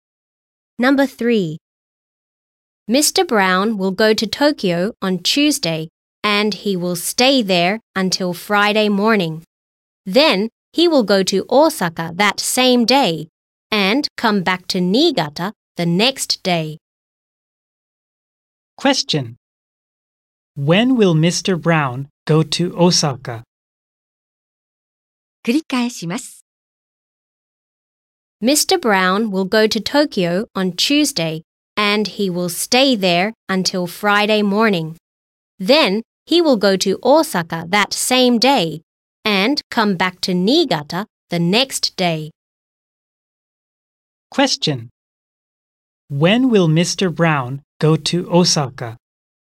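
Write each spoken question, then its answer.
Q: When will Mr. Brown go to Osaka?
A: On Friday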